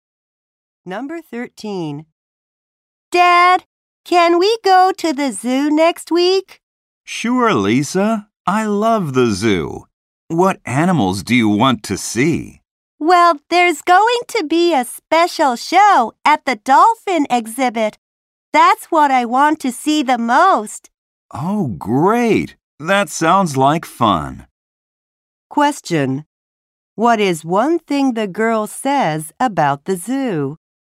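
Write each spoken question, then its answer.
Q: What is one thing the girl says about the zoo?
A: She most wants to see the special dolphin show.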